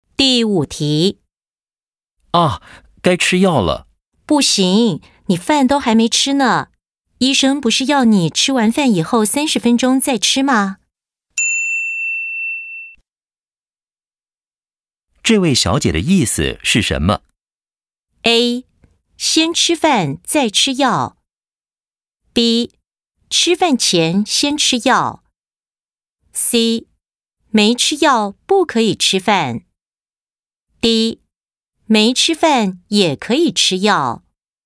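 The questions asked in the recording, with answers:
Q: 这位小姐的意思是什么?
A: A: 先吃饭再吃药。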